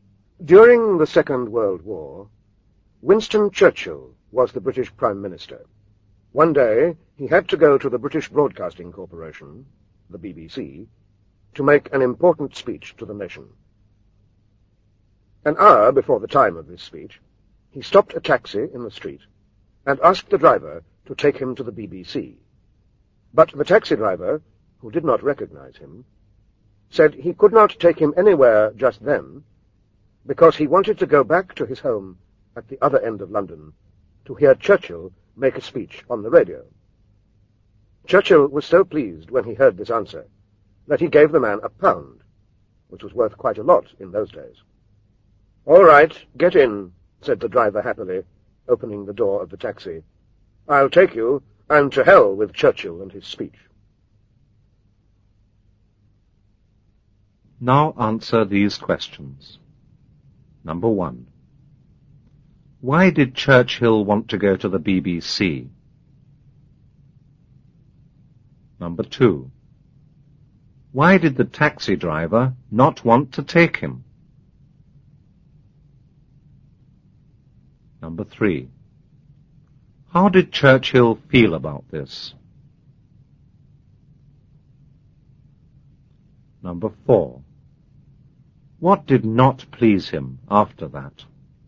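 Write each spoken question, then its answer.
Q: Why did Churchill want to go to the BBC?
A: To make an important speech to the nation

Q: Why did the taxi driver not want to take him?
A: He wanted to go home to hear Churchill's speech on the radio

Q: How did Churchill feel about this?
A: He was very pleased

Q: What did not please him after that?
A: The driver took the money and said "to hell with Churchill and his speech"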